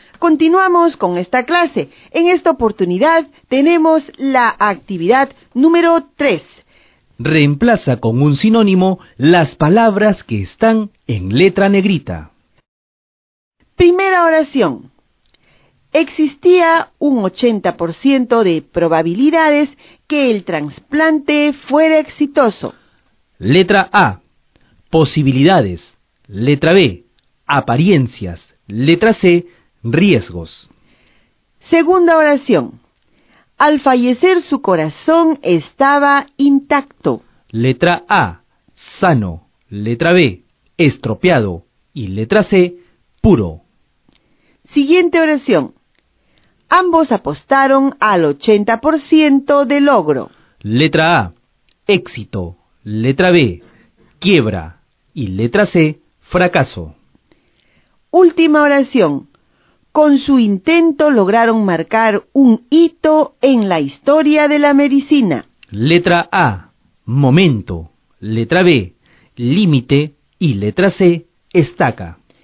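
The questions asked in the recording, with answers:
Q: Existía un 80% de probabilidades que el trasplante fuera exitoso.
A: A: Posibilidades

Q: Al fallecer su corazón estaba intacto.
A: A: Sano

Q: Ambos apostaron al 80% de logro.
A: A: Éxito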